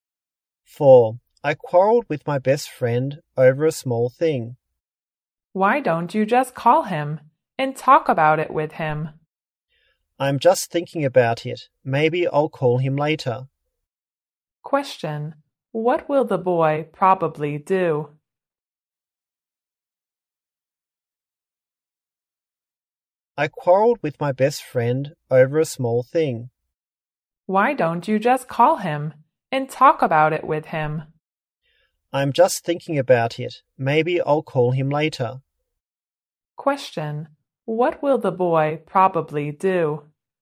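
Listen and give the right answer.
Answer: Call his friend later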